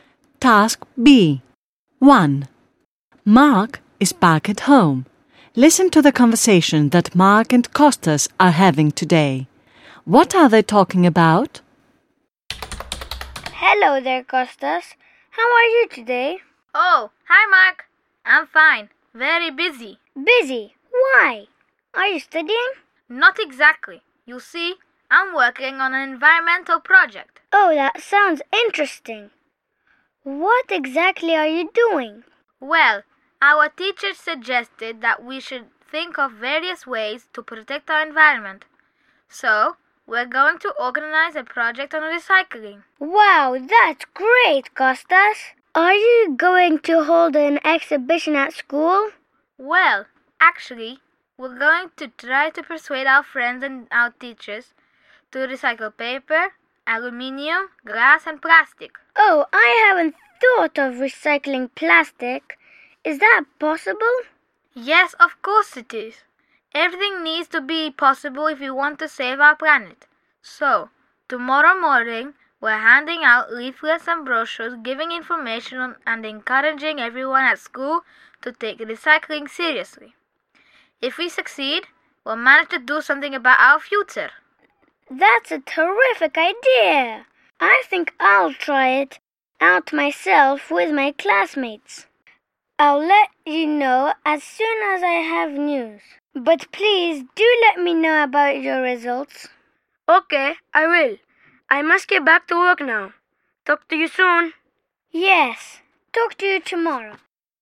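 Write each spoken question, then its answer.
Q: What are they talking about?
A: Kostas's environmental project on recycling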